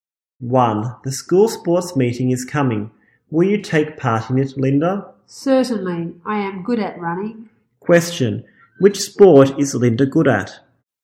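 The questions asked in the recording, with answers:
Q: Which sport is Linda good at?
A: Running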